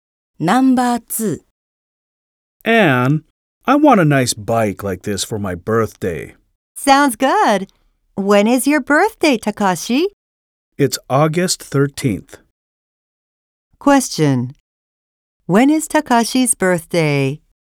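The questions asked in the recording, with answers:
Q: When is Takashi's birthday?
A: August 13th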